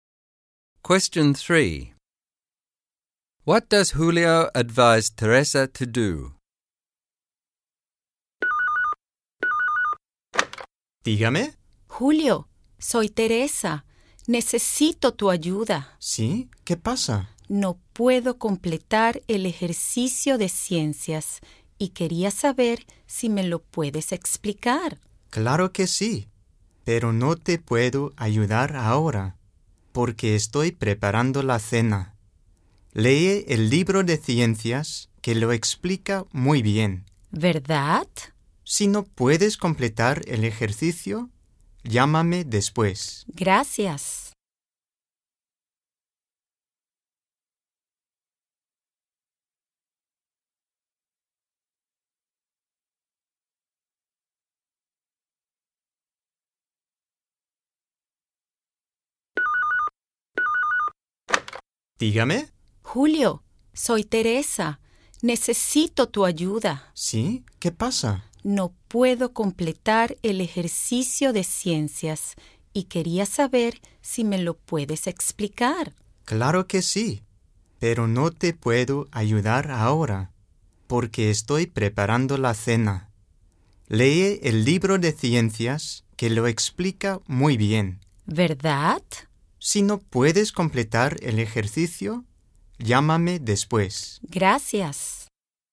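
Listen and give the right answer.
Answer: Read the science book, and call him later if she still can't finish the exercise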